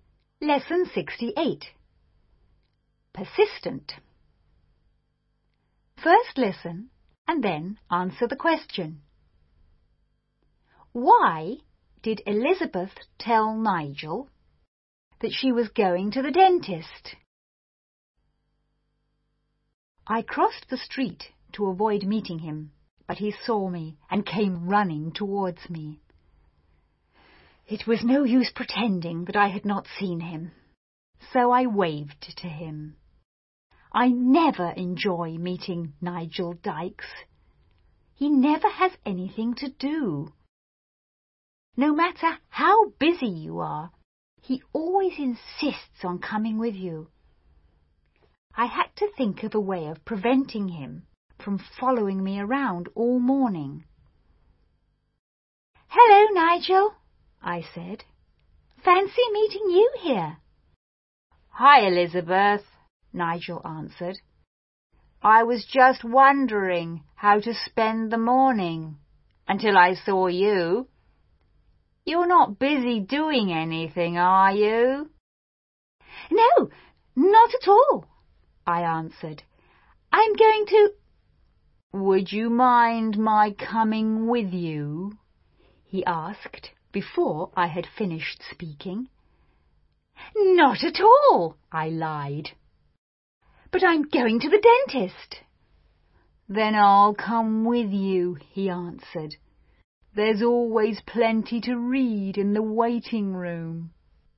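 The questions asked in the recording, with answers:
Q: Why did Elizabeth tell Nigel that she was going to the dentist?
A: To stop him from following her around all morning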